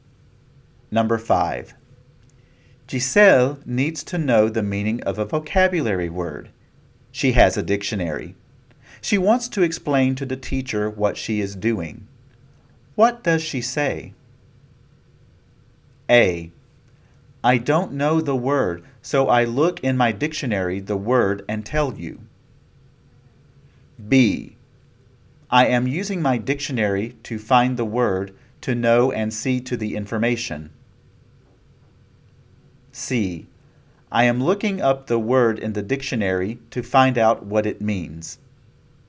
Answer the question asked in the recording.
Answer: If you chose C, I am looking up the word in the dictionary to find out what it means, then you are right.